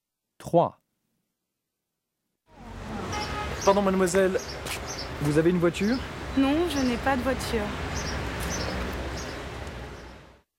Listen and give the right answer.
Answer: 3, non.